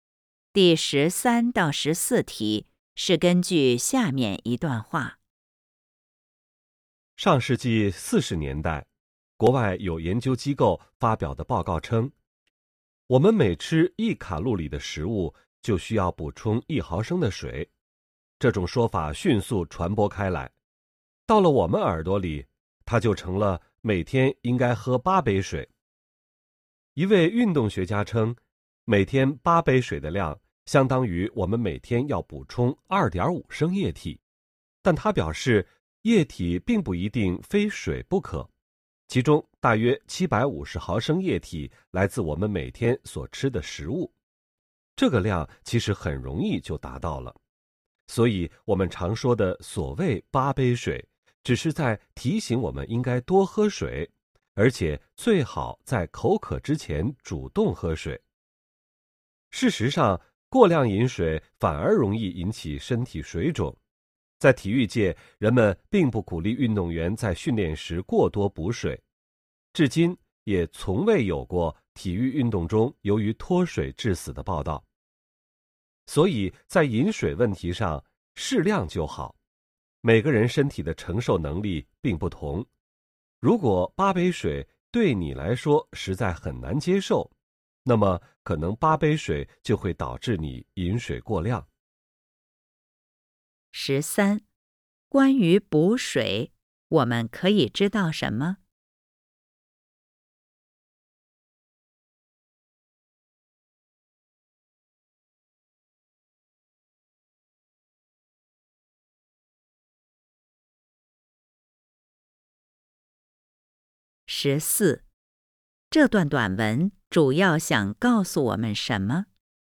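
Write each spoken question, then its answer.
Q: 这段短文主要想告诉我们什么?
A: 饮水适量就好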